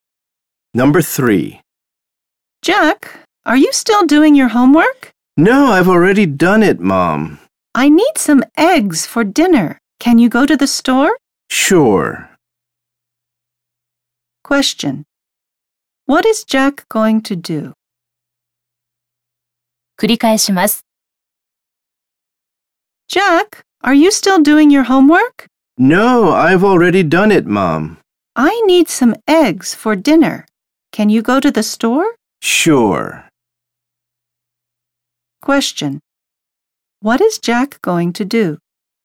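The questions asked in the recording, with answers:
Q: Question. What is Jack going to do?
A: Go to the store to buy some eggs.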